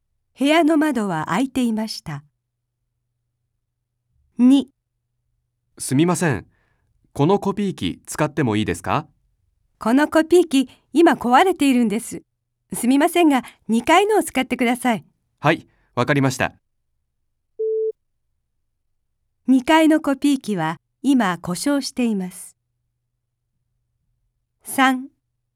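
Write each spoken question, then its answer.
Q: 2階のコピー機は今故障しています。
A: 正しくない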